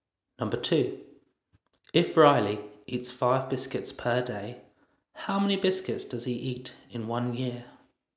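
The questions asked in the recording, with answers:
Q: If Riley eats 5 biscuits per day, how many biscuits does he eat in 1 year?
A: 1,825 biscuits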